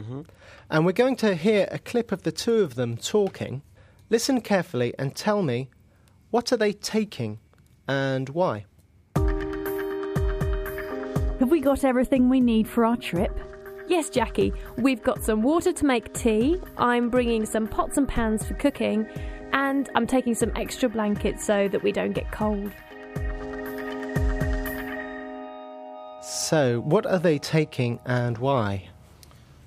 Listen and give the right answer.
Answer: Jackie and Eleanor are taking some water to make tea, some pots and pans for cooking, and some extra blankets so they don't get cold.